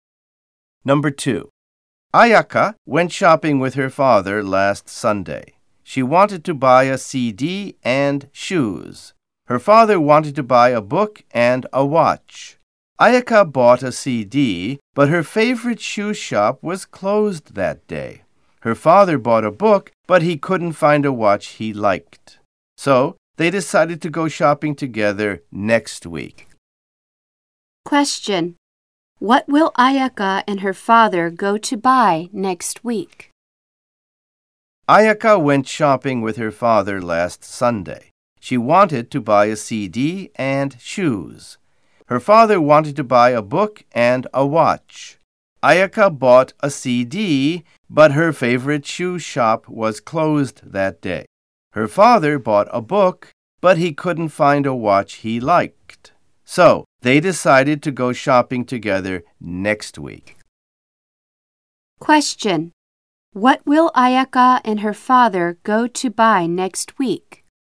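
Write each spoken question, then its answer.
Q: What will Ayaka and her father go to buy next week?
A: Shoes and a watch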